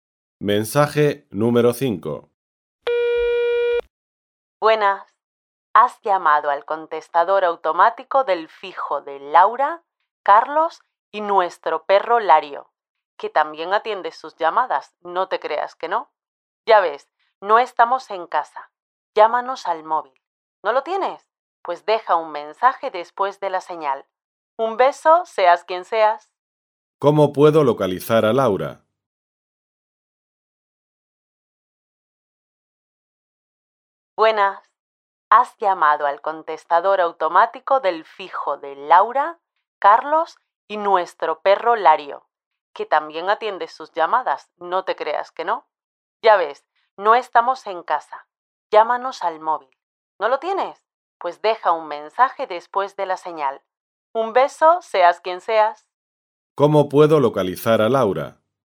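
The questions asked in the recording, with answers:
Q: ¿Cómo puedo localizar a Laura?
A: Llamando al móvil o dejando un mensaje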